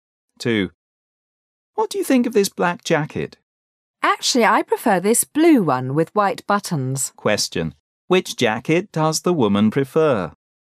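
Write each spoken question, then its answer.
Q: Which jacket does the woman prefer?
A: The blue one with white buttons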